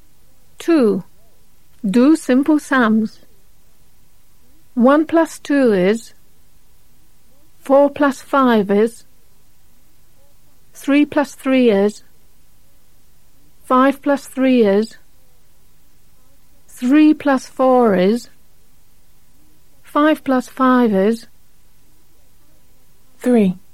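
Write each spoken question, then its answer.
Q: 5 plus 5 is.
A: 10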